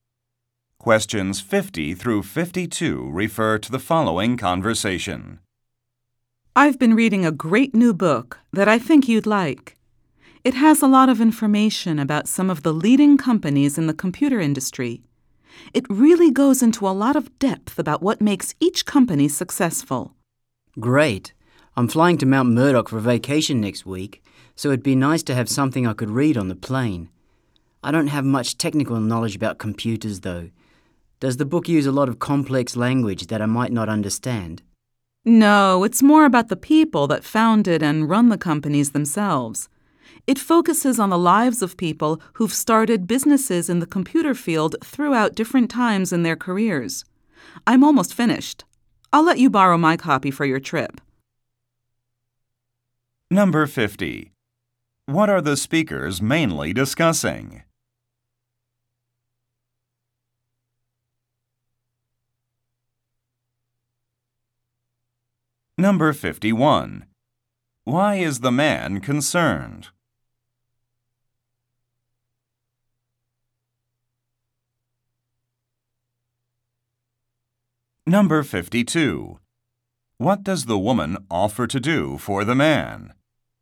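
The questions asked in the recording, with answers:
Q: What are the speakers mainly discussing?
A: A book about computer companies

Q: Why is the man concerned?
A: He lacks technical knowledge about computers

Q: What does the woman offer to do for the man?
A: Lend him her copy of the book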